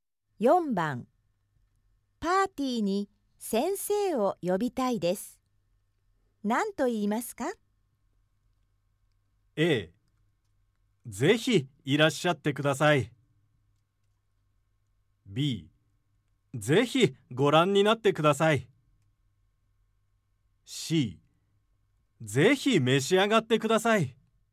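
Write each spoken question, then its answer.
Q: パーティーに先生を呼びたいです。何と言いますか?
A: A: ぜひいらっしゃってください。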